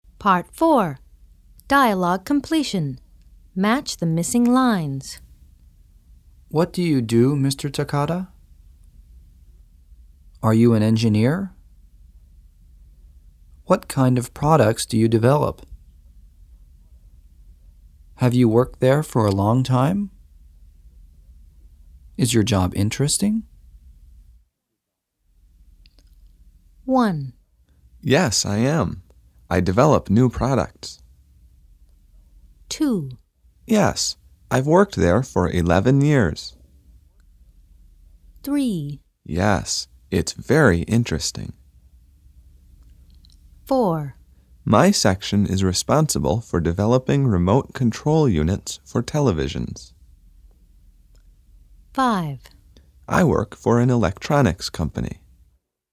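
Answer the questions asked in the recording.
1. 5: I work for an electronics company.
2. 1: Yes, I am. I develop new products.
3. 4: My section is responsible for developing remote control units for televisions.
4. 2: Yes, I've worked there for 11 years.
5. 3: Yes, it's very interesting.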